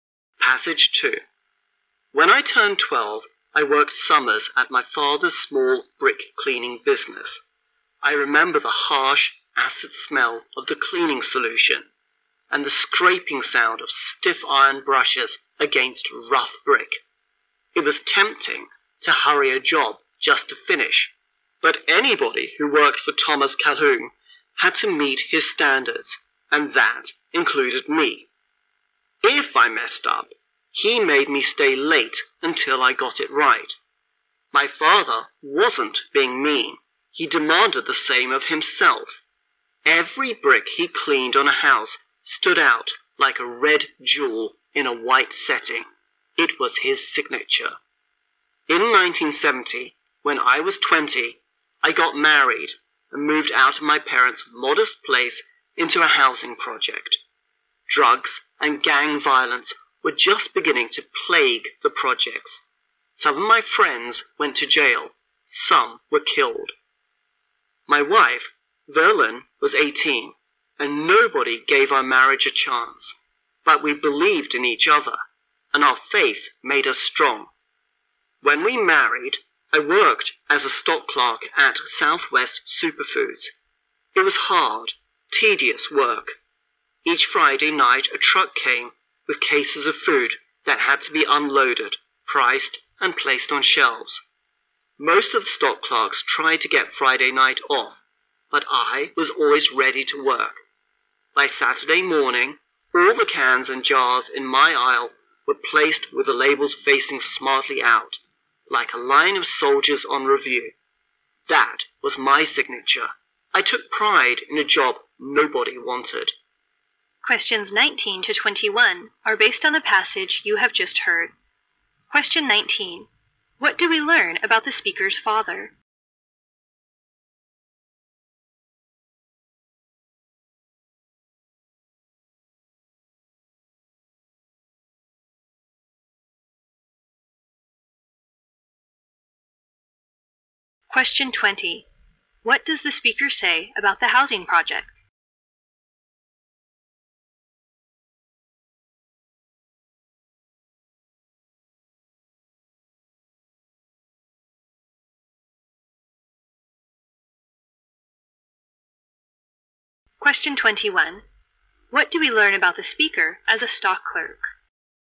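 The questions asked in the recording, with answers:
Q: What do we learn about the speaker's father?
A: He demanded high standards of himself and others

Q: What does the speaker say about the housing project?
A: Drugs and gang violence were beginning to plague it

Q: What do we learn about the speaker as a stock clerk?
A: He took pride in a job nobody wanted and was always ready to work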